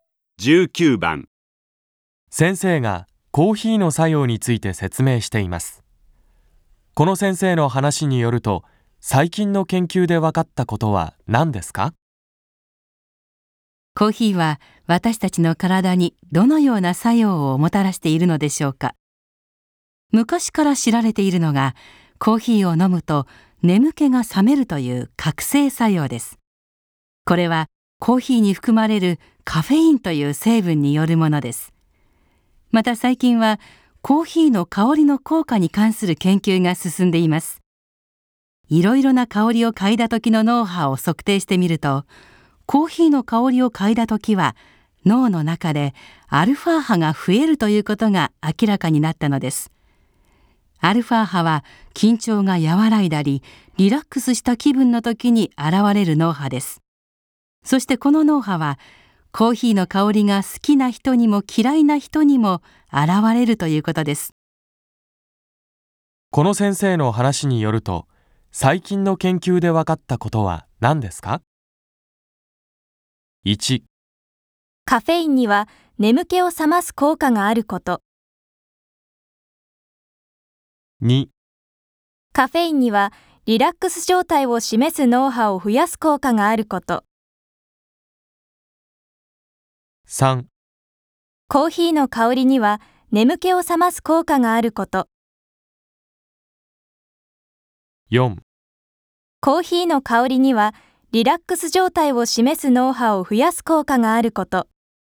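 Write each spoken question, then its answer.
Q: この先生の話によると、最近の研究で分かったことは何ですか?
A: 4: コーヒーの香りにはリラックス状態を示す脳波を増やす効果があること。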